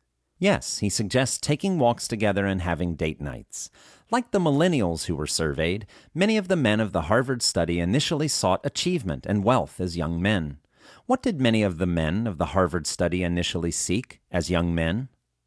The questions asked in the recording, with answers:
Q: What did many of the men of the Harvard study initially seek as young men?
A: Many of the men of the Harvard study initially sought achievement and wealth as young men.